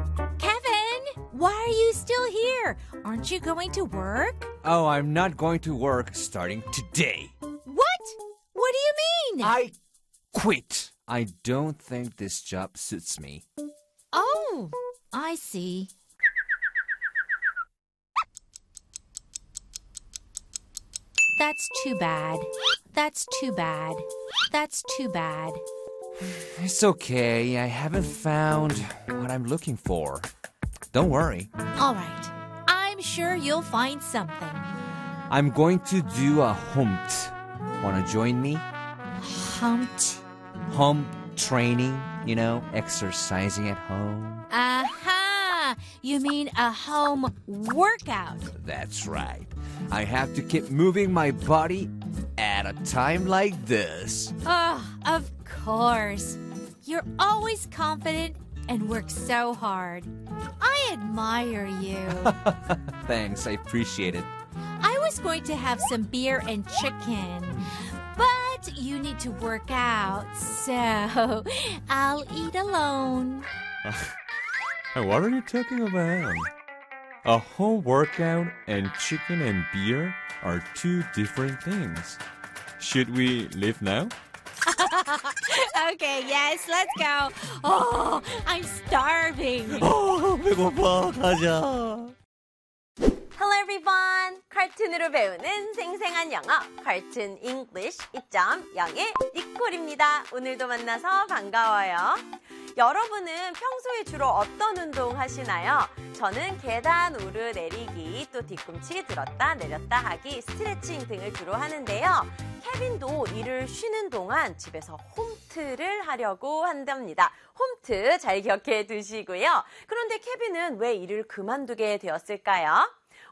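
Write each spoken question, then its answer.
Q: 그런데 케빈은 왜 일을 그만두게 되었을까요?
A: 일이 자기와 맞지 않는다고 생각해서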